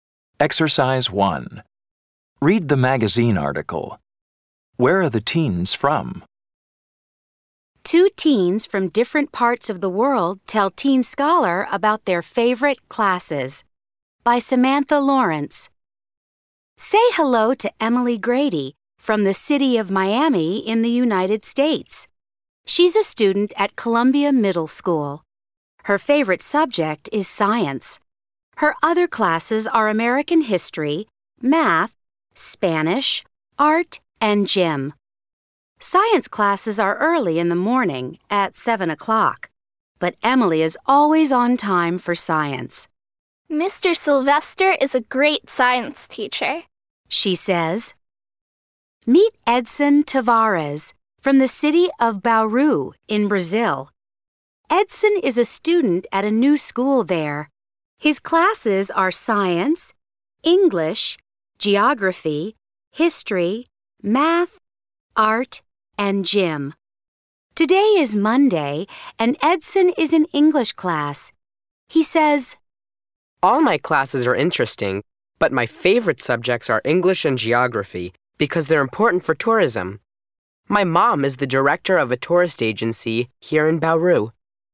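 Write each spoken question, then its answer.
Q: Where are the teens from?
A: Emily is from Miami in the United States and Edson is from Bauru in Brazil.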